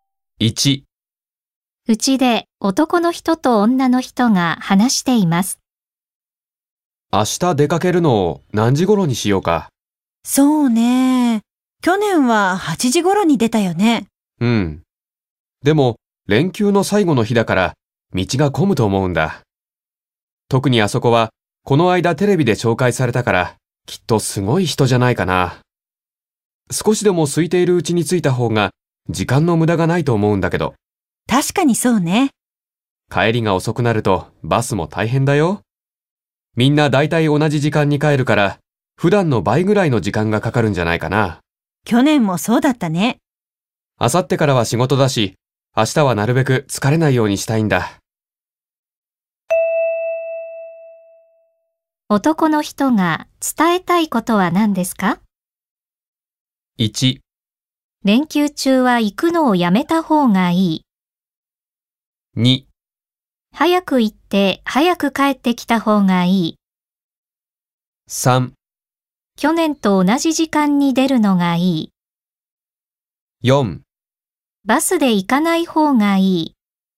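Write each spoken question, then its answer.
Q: 男の人が伝えたいことは何ですか?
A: 2: 早く行って早く帰ってきた方がいい。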